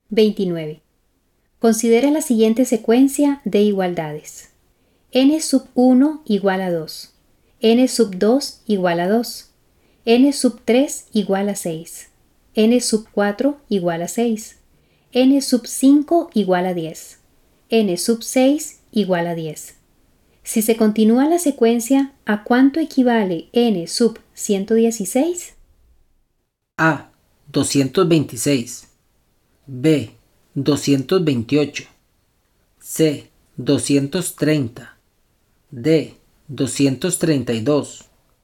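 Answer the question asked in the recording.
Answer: C: 230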